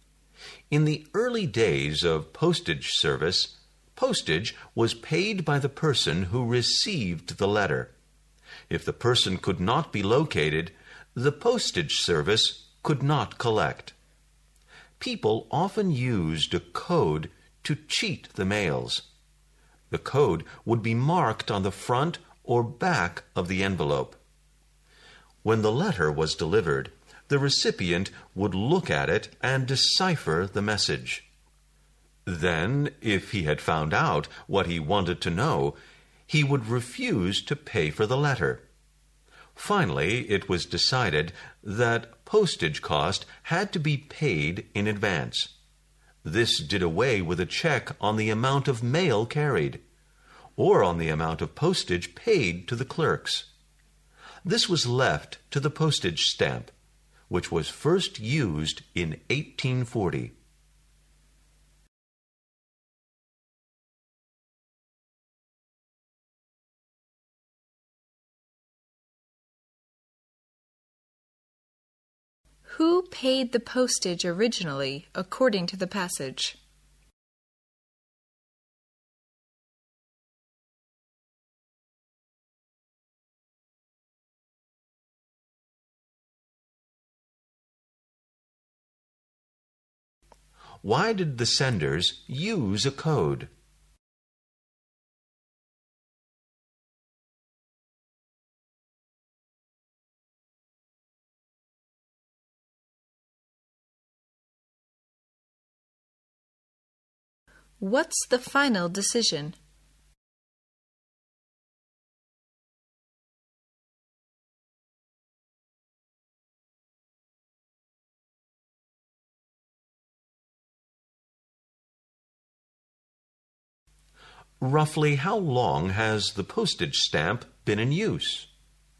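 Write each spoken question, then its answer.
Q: Who paid the postage originally, according to the passage?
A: The person who received the letter

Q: Why did the senders use a code?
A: To pass a message without the recipient paying postage (to cheat the mails)

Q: What's the final decision?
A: Postage had to be paid in advance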